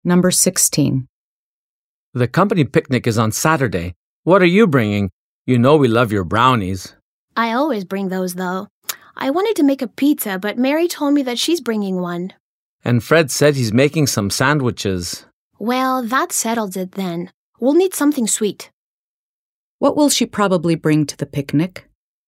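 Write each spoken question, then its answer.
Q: What will she probably bring to the picnic?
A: Brownies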